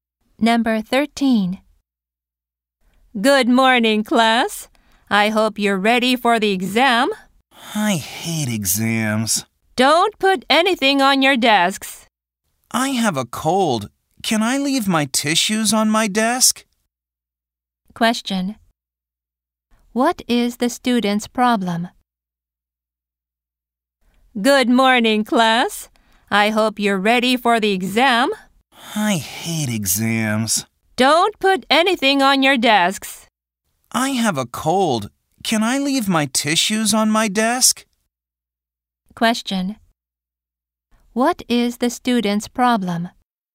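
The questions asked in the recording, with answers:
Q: What is the student's problem?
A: He has a cold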